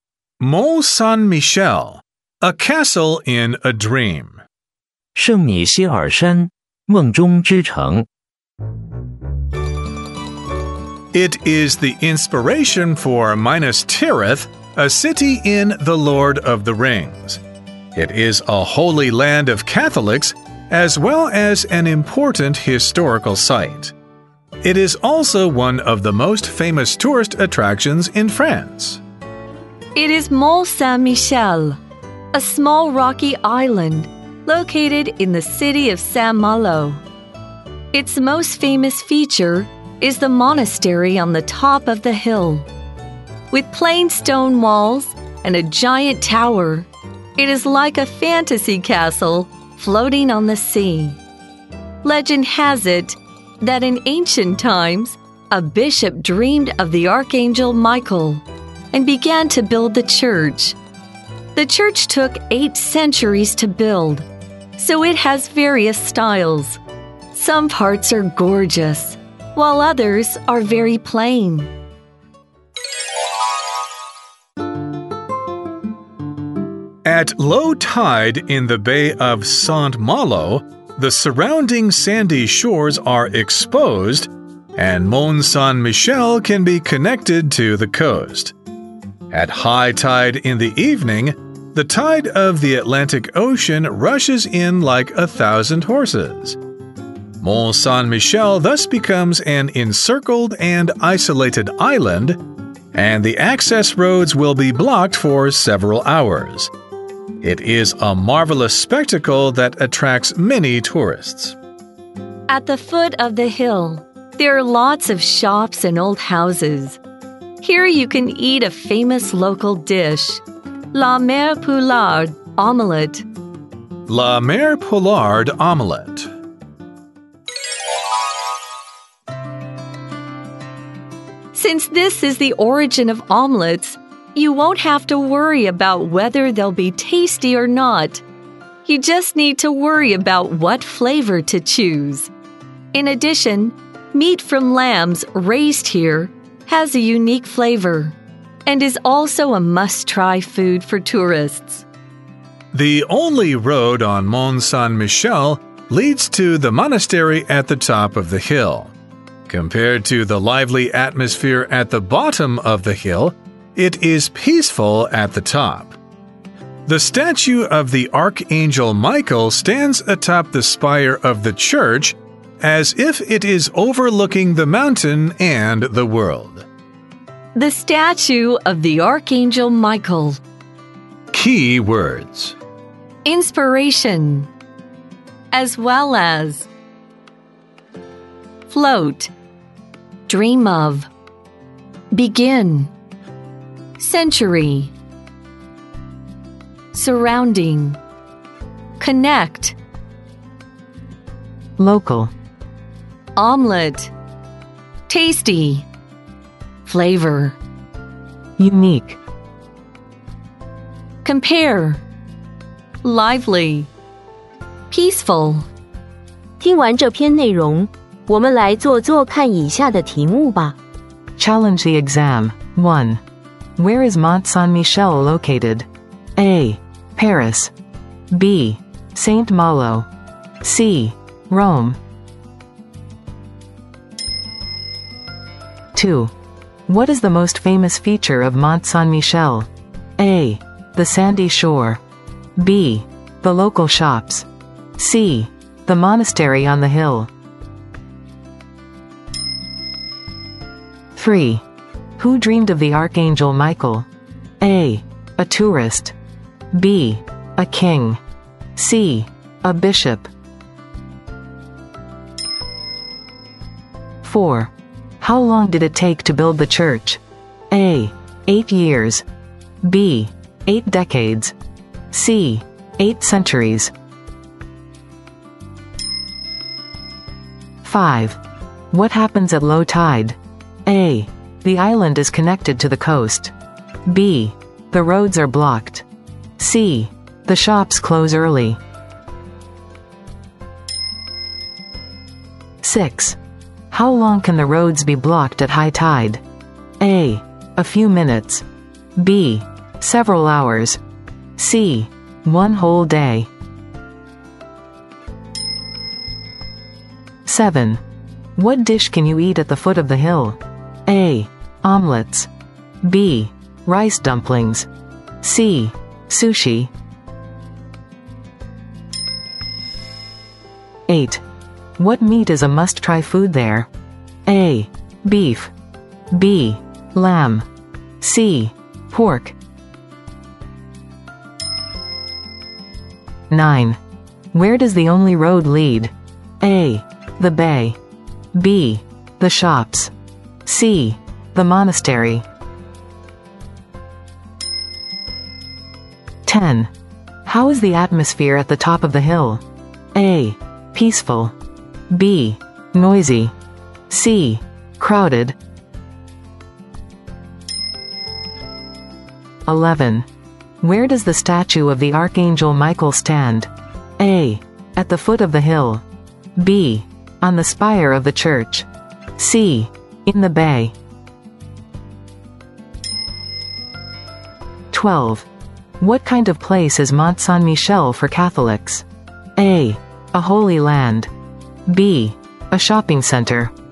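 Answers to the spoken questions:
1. B: Saint Malo.
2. C: The monastery on the hill.
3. C: A bishop.
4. C: 8 centuries.
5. A: The island is connected to the coast.
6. B: Several hours.
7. A: Omelets.
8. B: Lamb.
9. C: The monastery.
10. A: Peaceful.
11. B: On the spire of the church.
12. A: A holy land.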